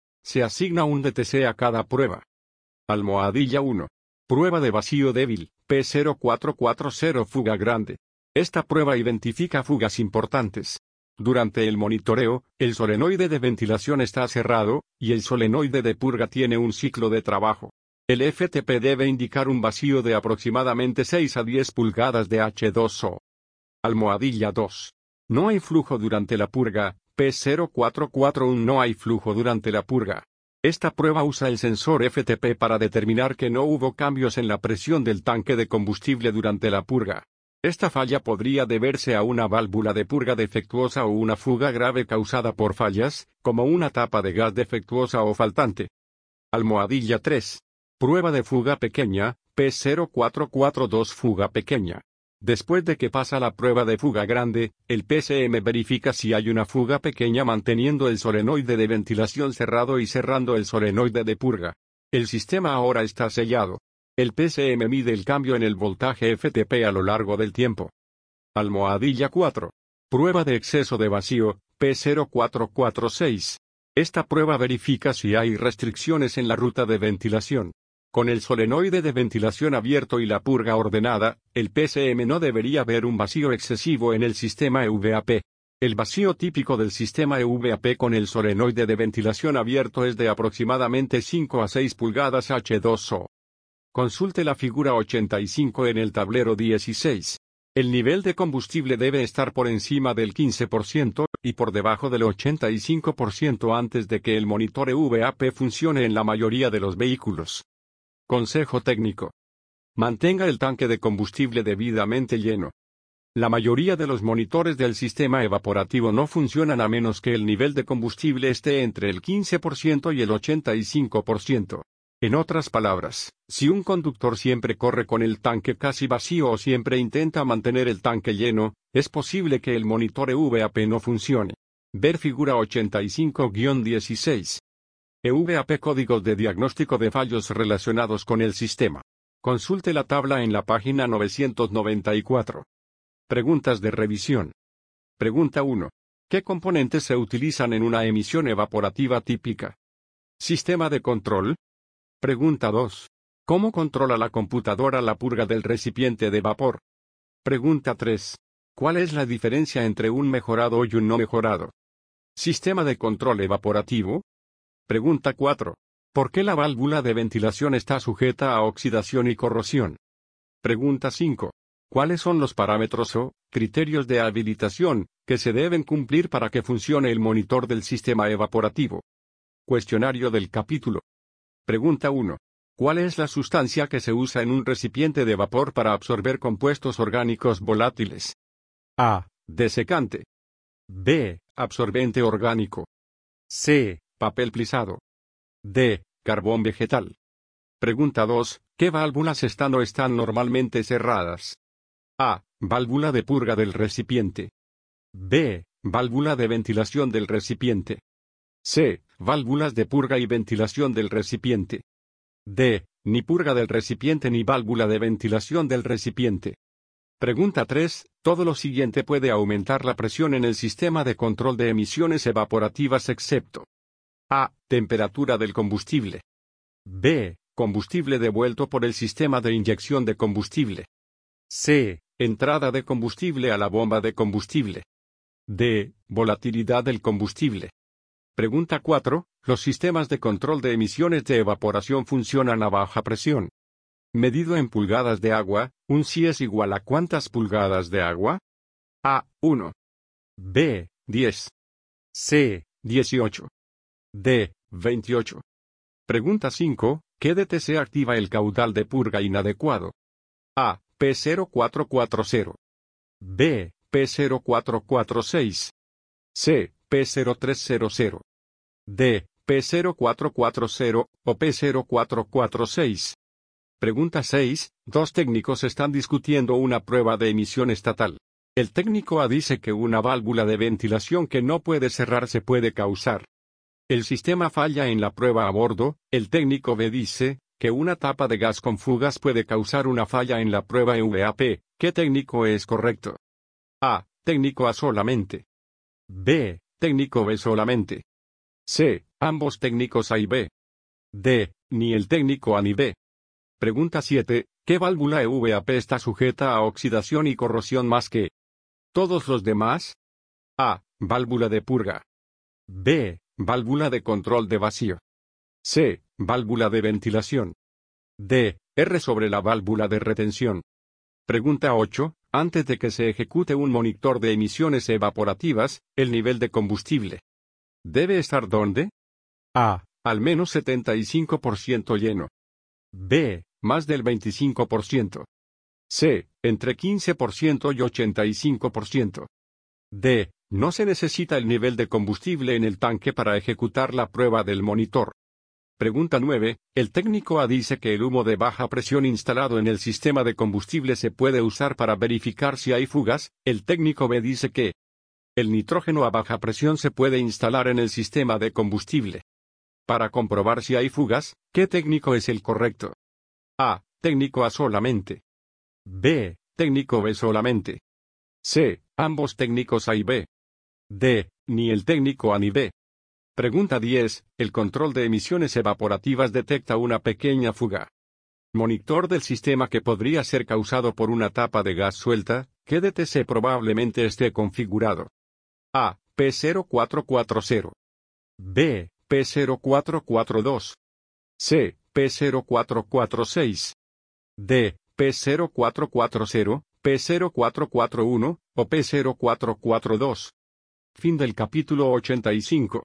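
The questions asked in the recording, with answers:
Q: Antes de que se ejecute un monitor de emisiones evaporativas, el nivel de combustible debe estar ¿dónde?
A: C: Entre 15% y 85%

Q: Monitor del sistema que podría ser causado por una tapa de gas suelta, ¿qué DTC probablemente esté configurado?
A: B: P0442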